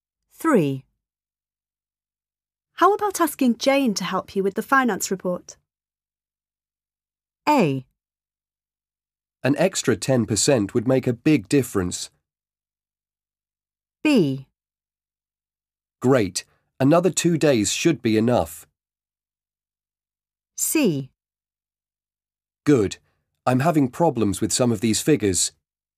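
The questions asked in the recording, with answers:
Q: How about asking Jane to help you with the finance report?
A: C: Good. I'm having problems with some of these figures.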